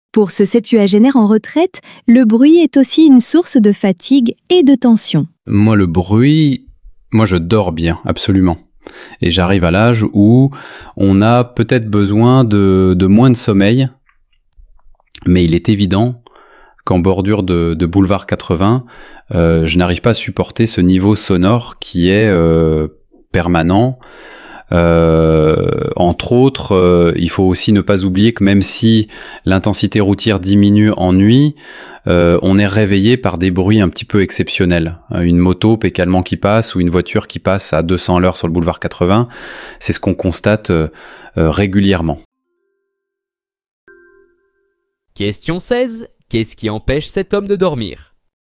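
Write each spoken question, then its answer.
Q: Qu'est-ce qui empêche cet homme de dormir ?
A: Des bruits exceptionnels la nuit, comme une moto ou une voiture qui passe très vite sur le boulevard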